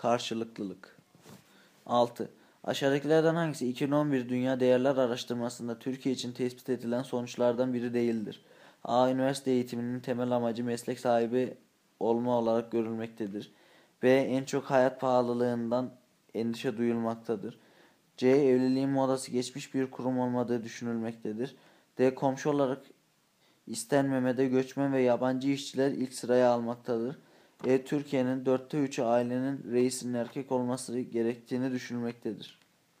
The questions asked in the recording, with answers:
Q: Aşağıdakilerden hangisi 2011 Dünya Değerler Araştırması'nda Türkiye için tespit edilen sonuçlardan biri değildir?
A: Doğru cevap D. Komşu olarak istenmemede göçmen ve yabancı işçiler ilk sıraya almaktadır.